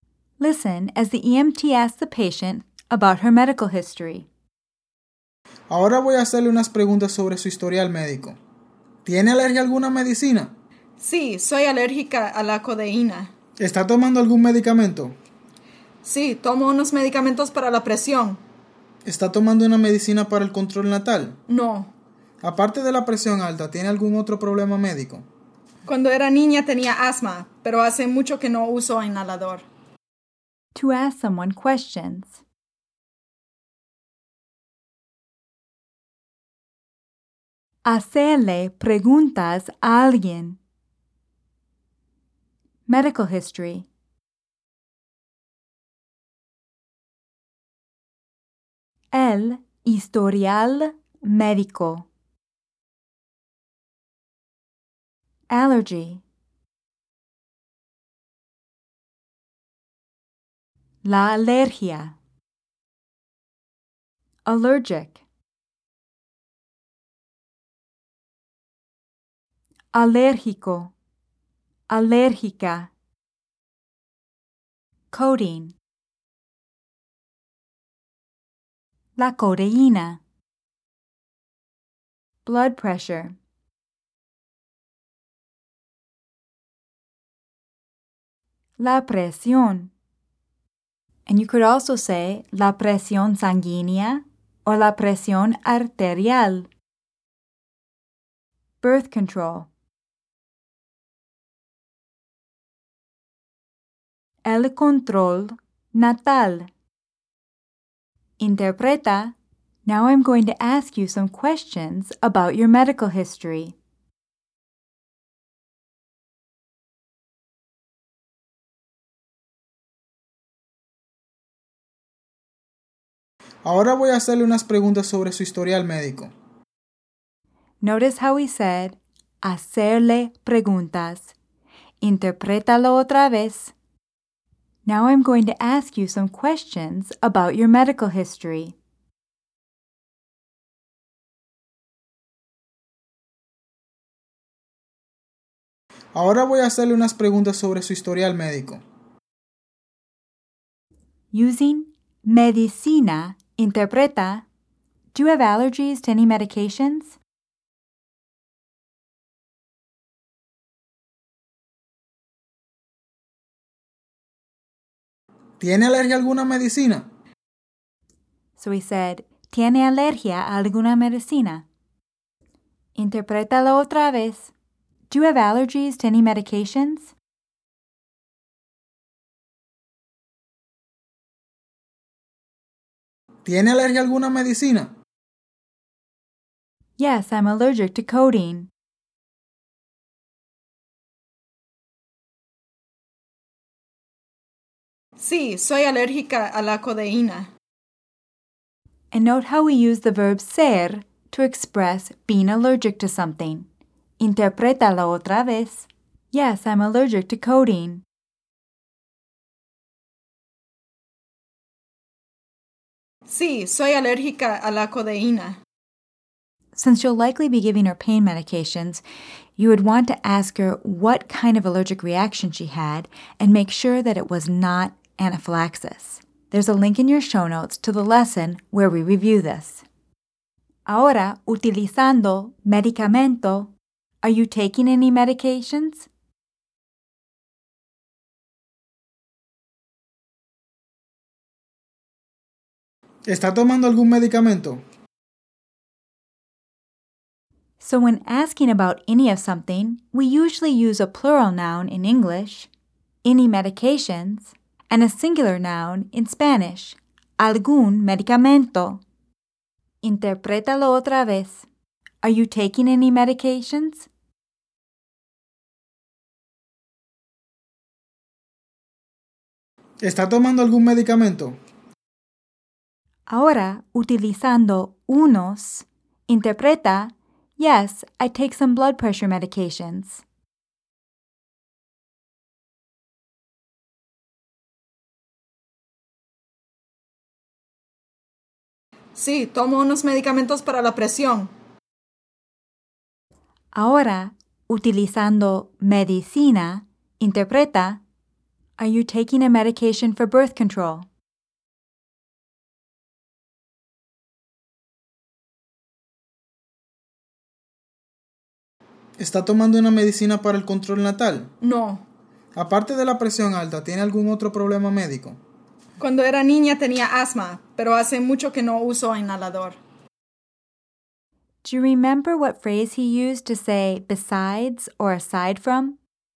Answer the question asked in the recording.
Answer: Aparte de.